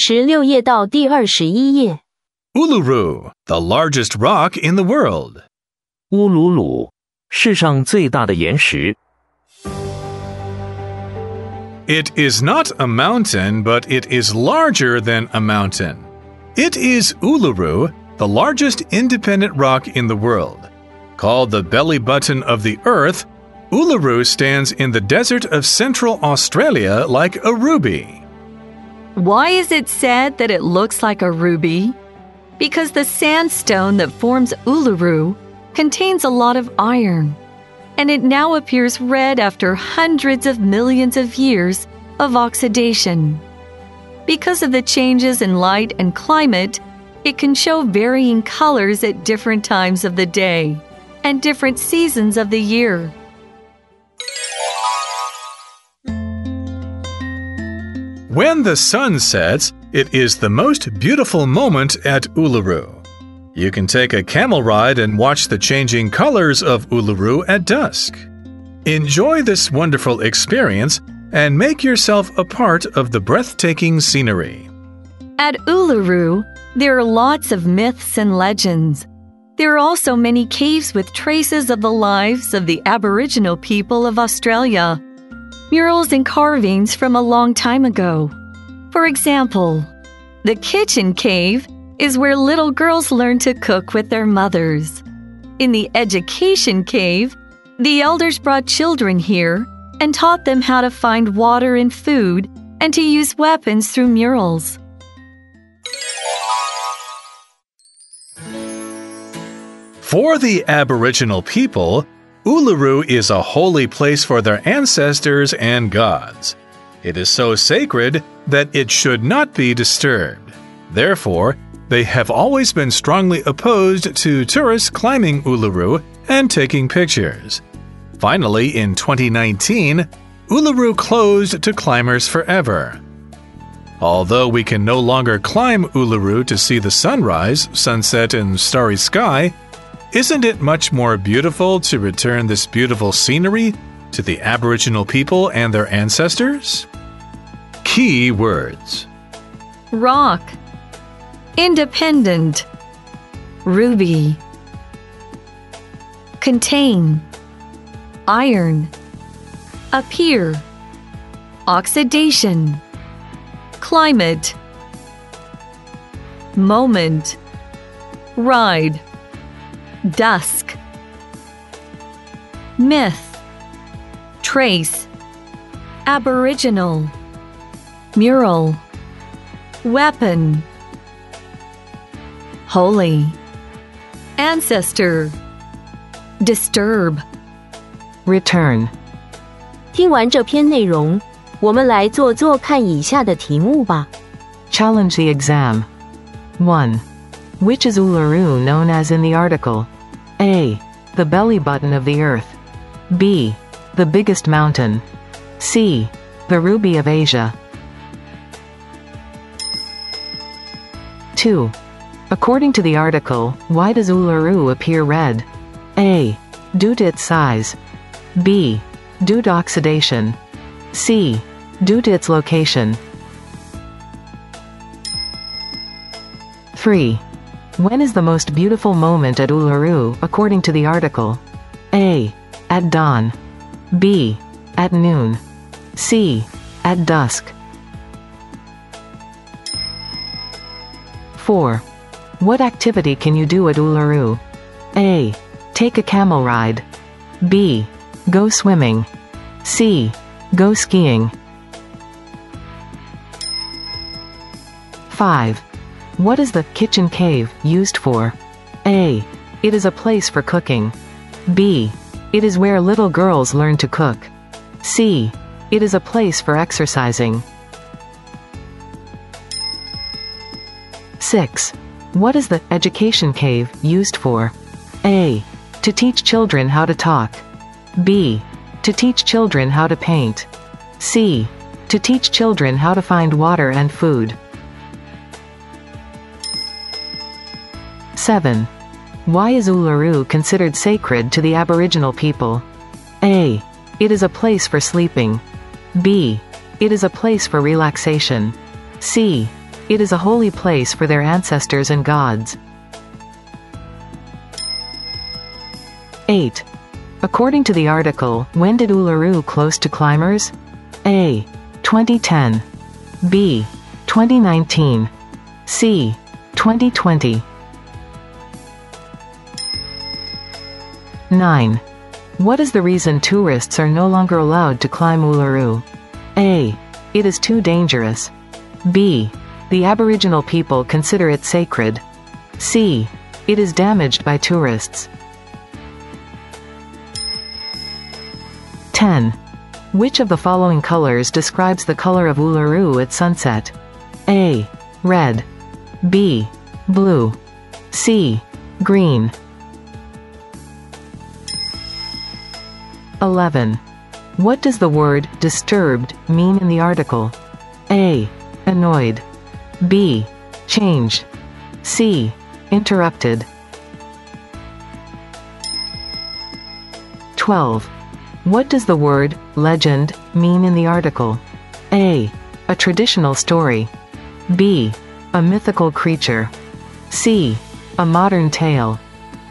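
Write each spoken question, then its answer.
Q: Which is Uluru known as in the article?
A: A: The belly button of the earth.

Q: According to the article, why does Uluru appear red?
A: B: Due to oxidation.

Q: When is the most beautiful moment at Uluru, according to the article?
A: C: At dusk.

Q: What activity can you do at Uluru?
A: A: Take a camel ride.

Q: What is the kitchen cave used for?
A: B: It is where little girls learn to cook.

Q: What is the education cave used for?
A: C: To teach children how to find water and food.

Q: Why is Uluru considered sacred to the Aboriginal people?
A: C: It is a holy place for their ancestors and gods.

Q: According to the article, when did Uluru close to climbers?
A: B: 2019.

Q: What is the reason tourists are no longer allowed to climb Uluru?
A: B: The Aboriginal people consider it sacred.

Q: What does the word legend mean in the article?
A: A: A traditional story.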